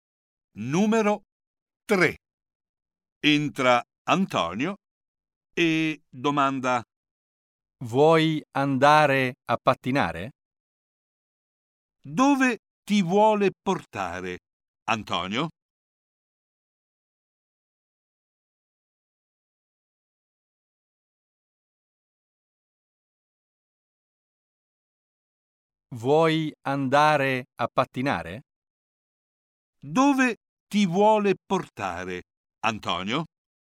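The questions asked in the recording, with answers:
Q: Dove ti vuole portare Antonio?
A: A pattinare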